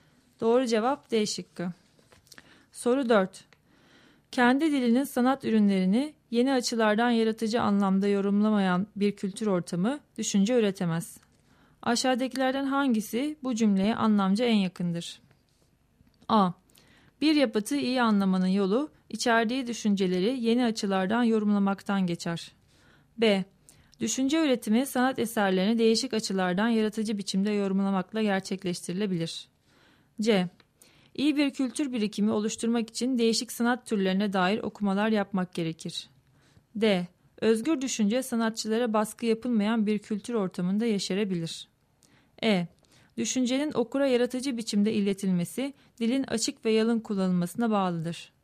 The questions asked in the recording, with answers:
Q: Aşağıdakilerden hangisi bu cümleye anlamca en yakındır?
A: Doğru cevap B şıkkı.